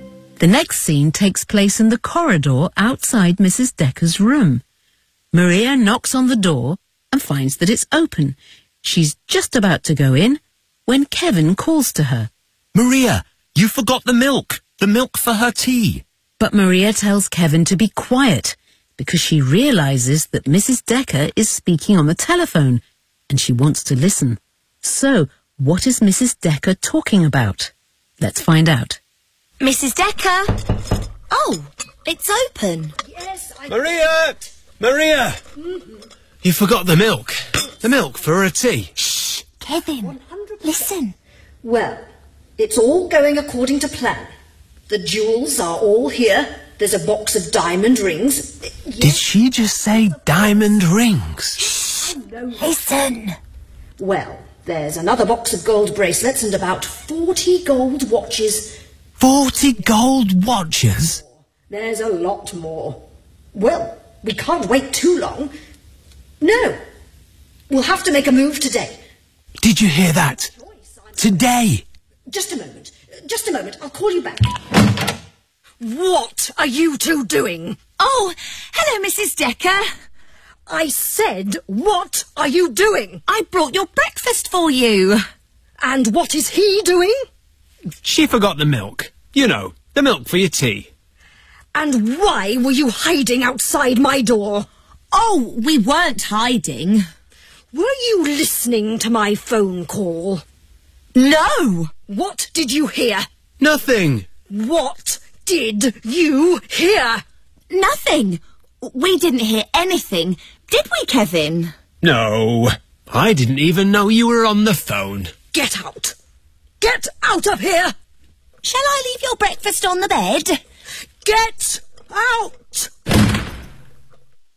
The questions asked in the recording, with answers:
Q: So, what is Mrs. Decker talking about?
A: "The jewels are all here.